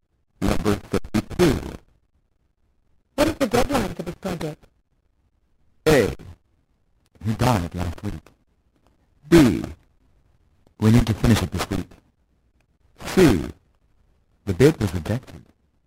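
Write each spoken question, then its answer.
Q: What is the deadline for this project?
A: B: We need to finish it this week.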